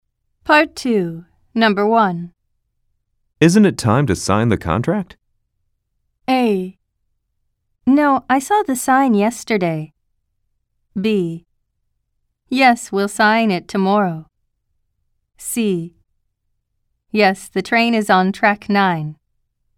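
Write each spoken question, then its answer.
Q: Isn't it time to sign the contract?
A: A: Yes, we'll sign it tomorrow.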